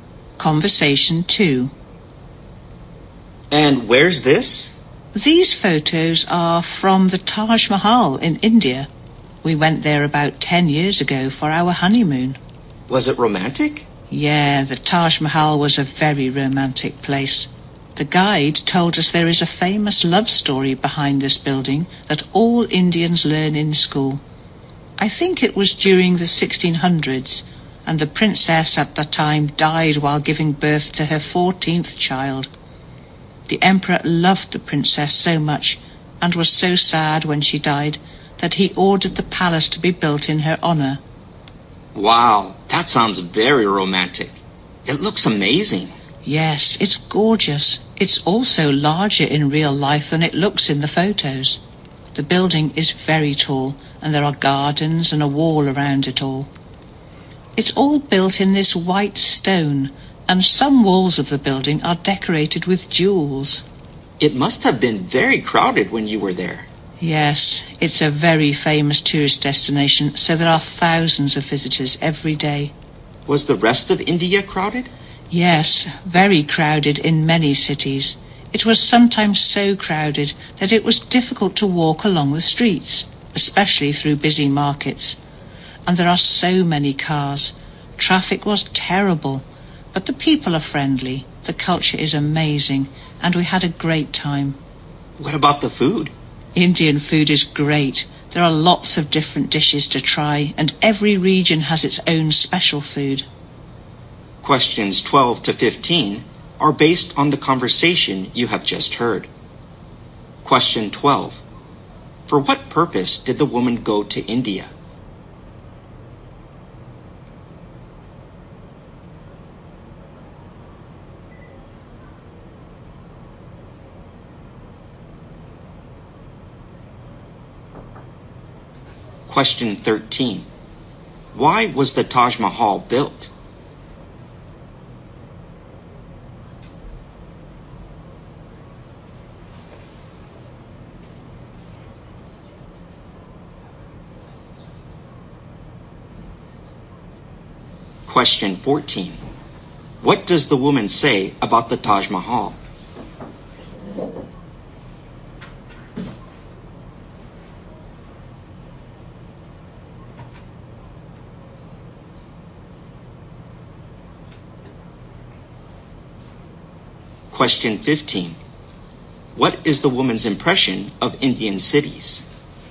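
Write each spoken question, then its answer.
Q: For what purpose did the woman go to India?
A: Her honeymoon

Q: Why was the Taj Mahal built?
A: To honor the emperor's beloved princess, who had died

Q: What is the woman's impression of Indian cities?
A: They are very crowded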